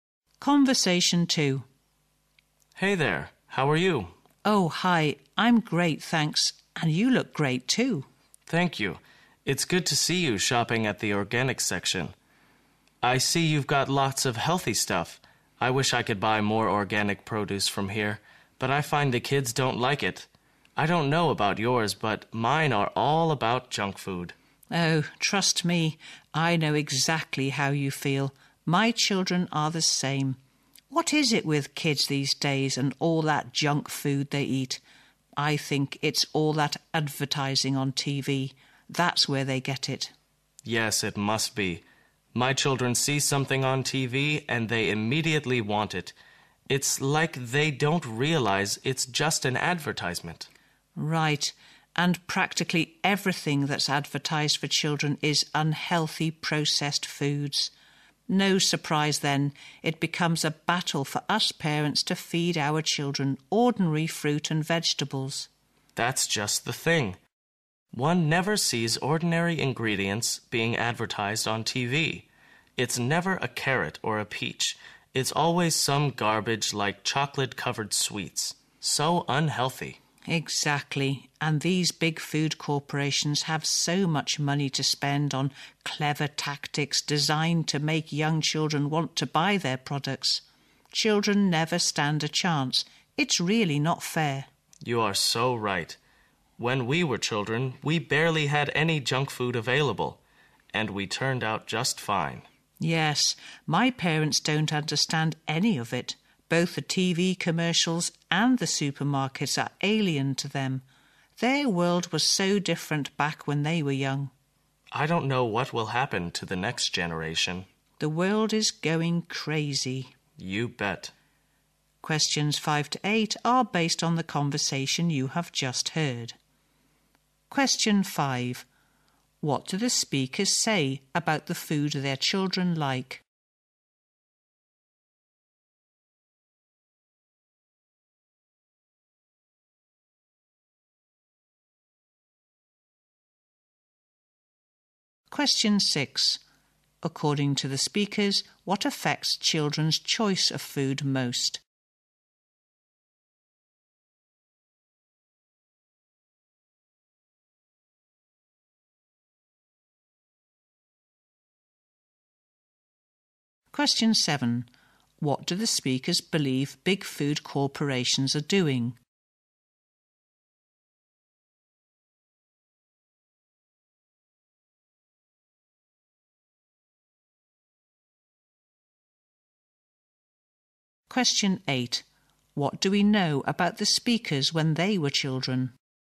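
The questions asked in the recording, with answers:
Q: What do the speakers say about the food their children like?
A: Their children like junk food

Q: According to the speakers, what affects children's choice of food most?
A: TV advertising

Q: What do the speakers believe big food corporations are doing?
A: Spending lots of money on clever tactics to make children want their products

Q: What do we know about the speakers when they were children?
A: They had barely any junk food available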